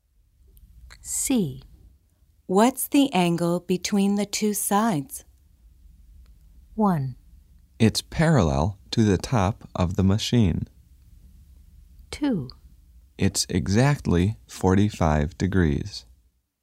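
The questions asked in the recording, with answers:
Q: What's the angle between the two sides?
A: 2: It's exactly 45 degrees.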